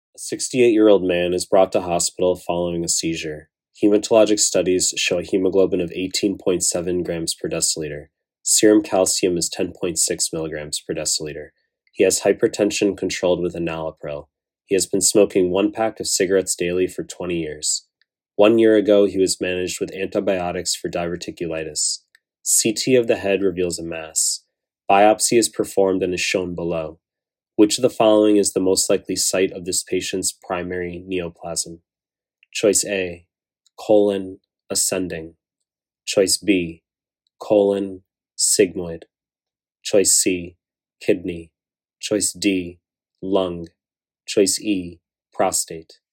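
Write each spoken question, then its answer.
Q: Which of the following is the most likely site of this patient's primary neoplasm?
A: C: kidney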